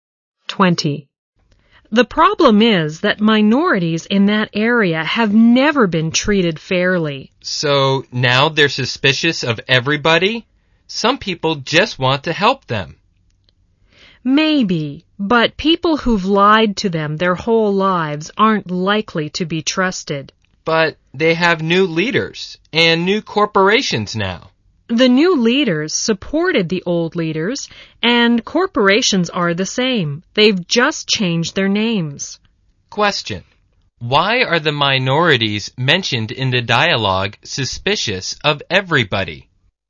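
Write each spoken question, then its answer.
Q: Why are the minorities mentioned in the dialogue suspicious of everybody?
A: Because they have never been treated fairly and have been lied to all their lives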